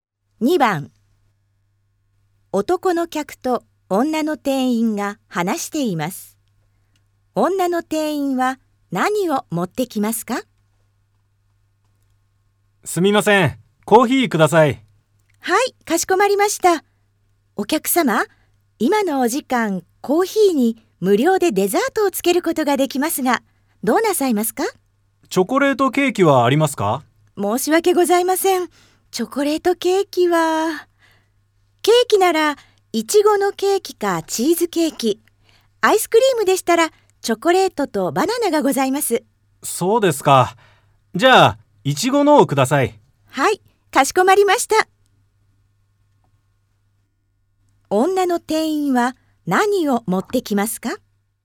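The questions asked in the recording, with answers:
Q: 女の店員は何を持ってきますか?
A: コーヒーといちごのケーキ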